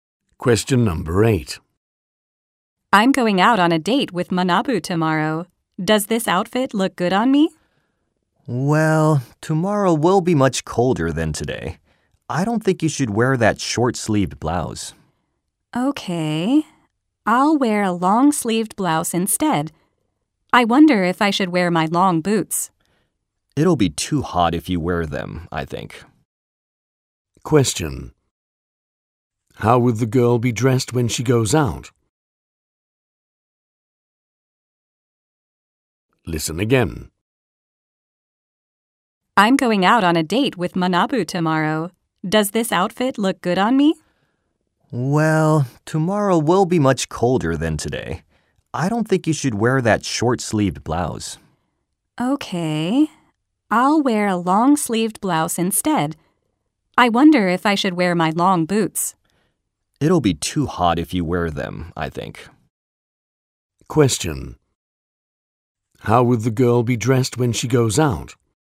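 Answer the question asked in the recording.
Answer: In a long-sleeved blouse, without long boots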